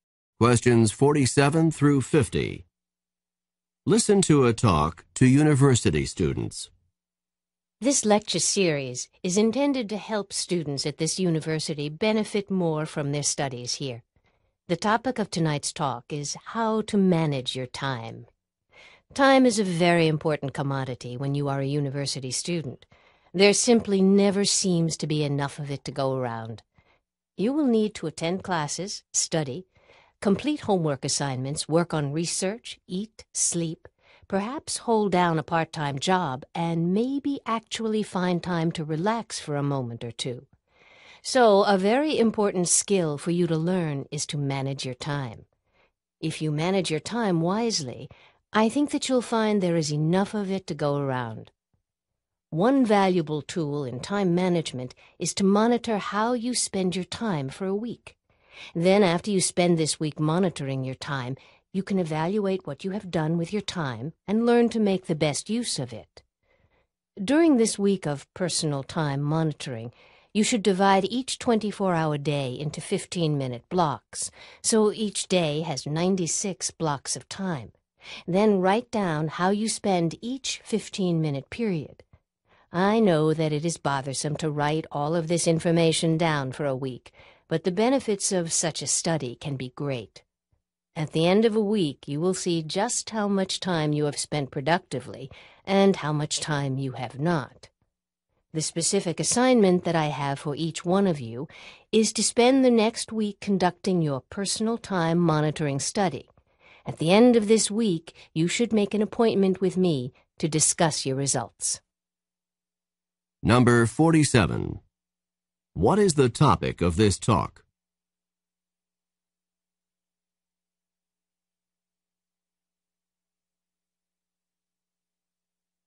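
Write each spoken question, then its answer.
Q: What is the topic of this talk?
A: How to manage your time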